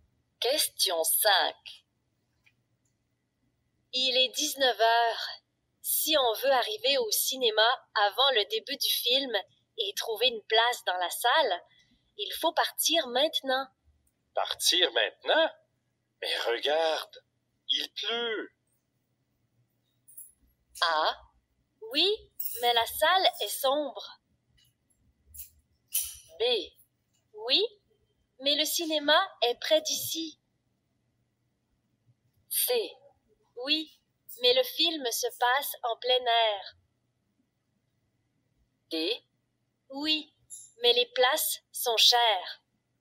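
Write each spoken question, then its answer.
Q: Partir maintenant? Mais regarde, il pleut.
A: B: Oui, mais le cinéma est près d'ici.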